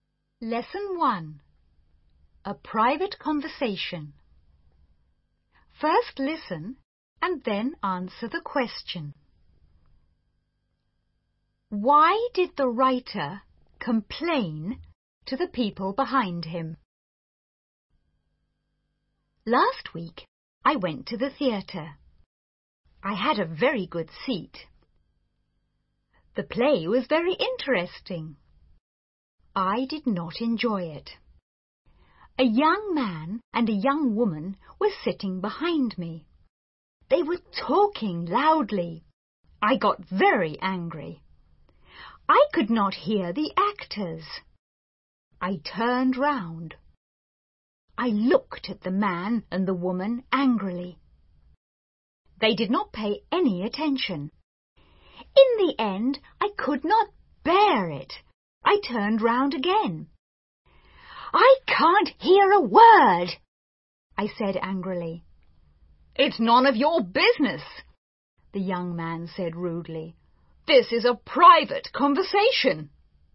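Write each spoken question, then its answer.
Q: Why did the writer complain to the people behind him?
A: Because they were talking loudly and he could not hear the actors.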